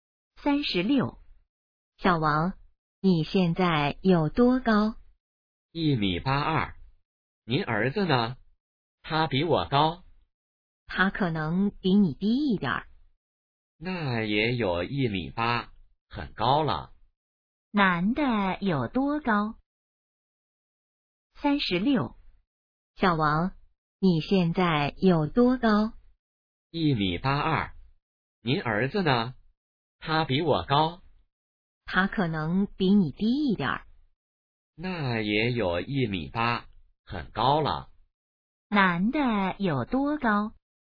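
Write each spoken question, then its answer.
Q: 男的有多高?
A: 1.82米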